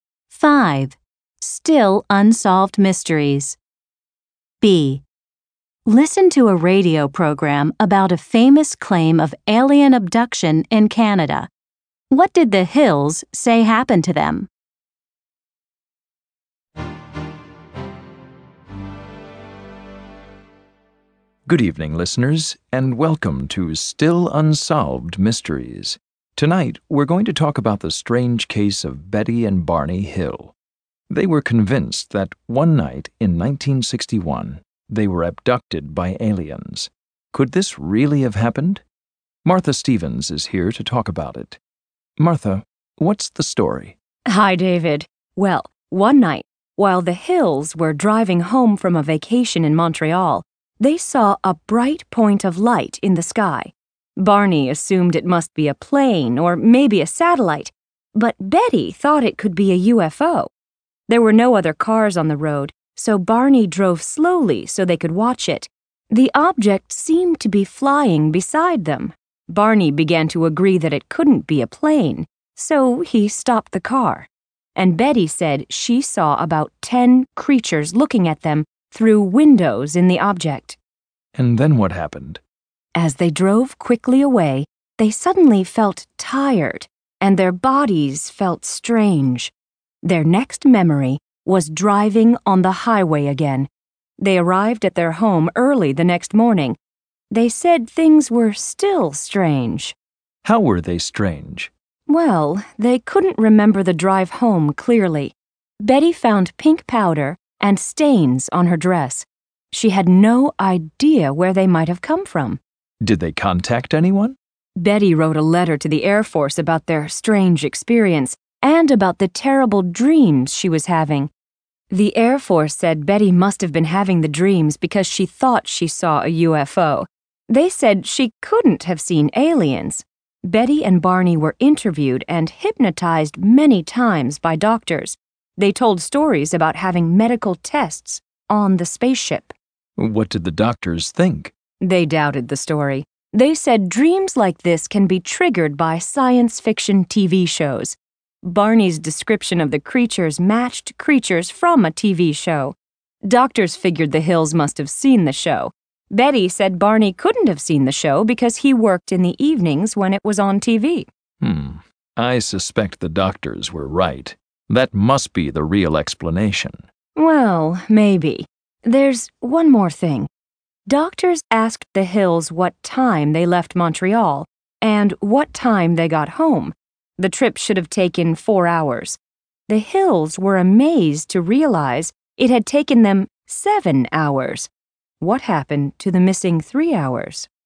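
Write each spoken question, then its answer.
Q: What did the Hills say happened to them?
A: They said aliens abducted them one night in 1961.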